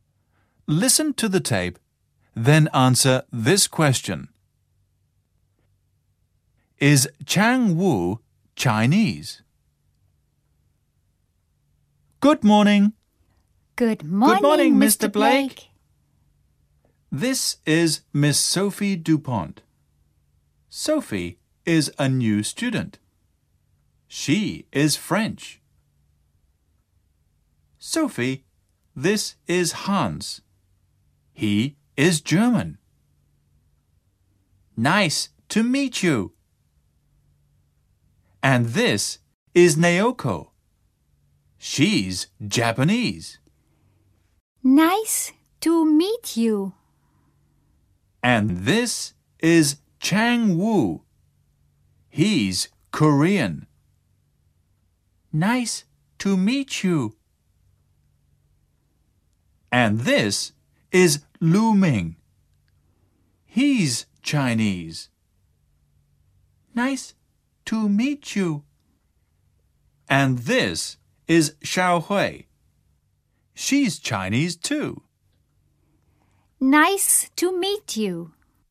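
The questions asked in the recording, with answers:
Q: Is Chang Wu Chinese?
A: No, he isn't. He's Korean.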